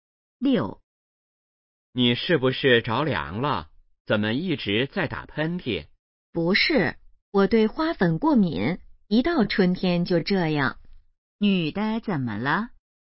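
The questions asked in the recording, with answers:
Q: 女的怎么了?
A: 对花粉过敏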